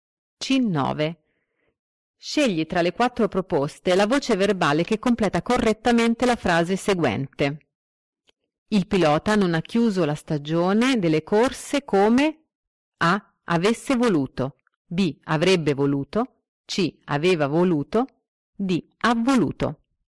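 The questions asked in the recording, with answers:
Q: Scegli tra le quattro proposte la voce verbale che completa correttamente la frase seguente.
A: B: avrebbe voluto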